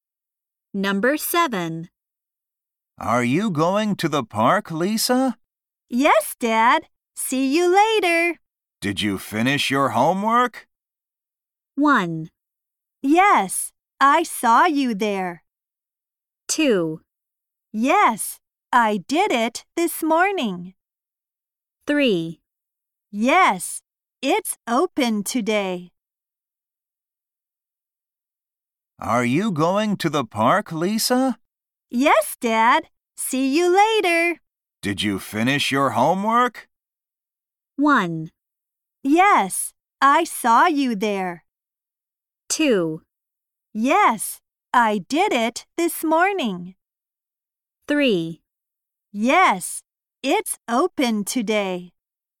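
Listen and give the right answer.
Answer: 2: Yes, I did it this morning.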